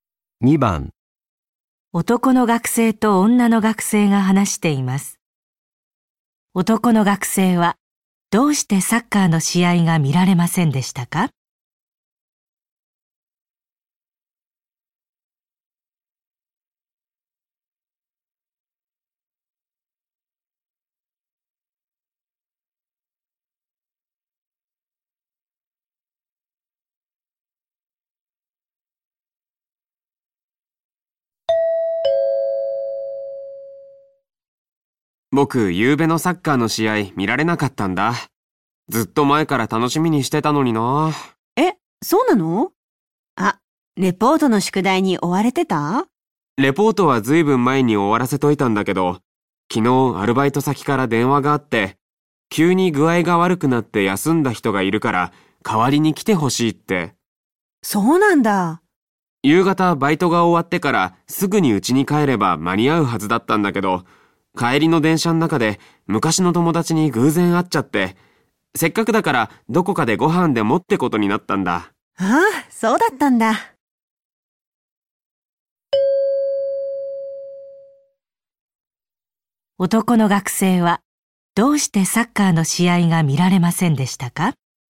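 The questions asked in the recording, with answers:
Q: 男の学生はどうしてサッカーの試合が見られませんでしたか?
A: バイトの帰りに昔の友達に偶然会って食事に行ったから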